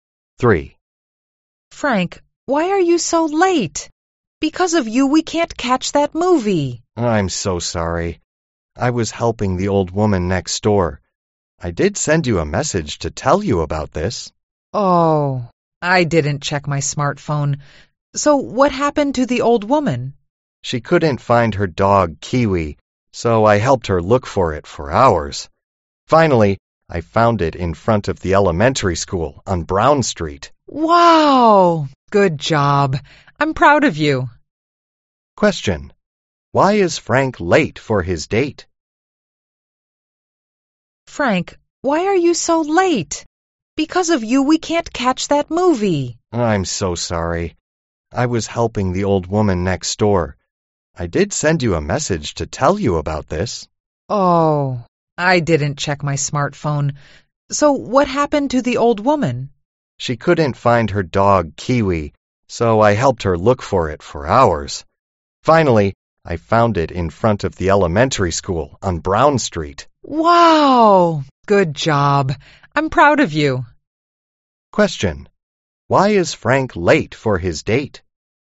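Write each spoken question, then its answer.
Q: Question. Why is Frank late for his date?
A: He was helping the old woman next door find her dog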